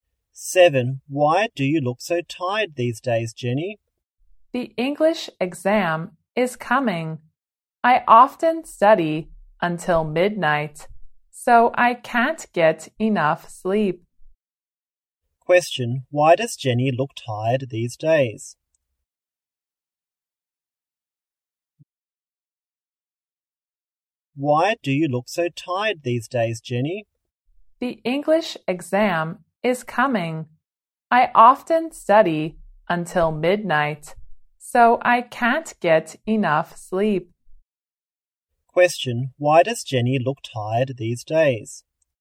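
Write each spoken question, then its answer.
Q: why does Jenny look tired these days?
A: She often studies until midnight for the English exam and can't get enough sleep.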